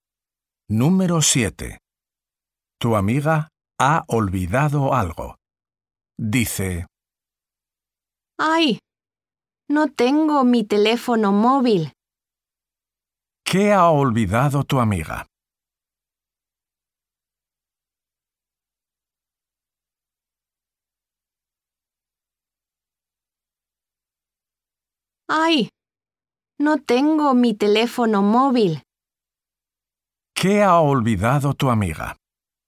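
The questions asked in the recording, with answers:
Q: ¿Qué ha olvidado tu amiga?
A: su teléfono móvil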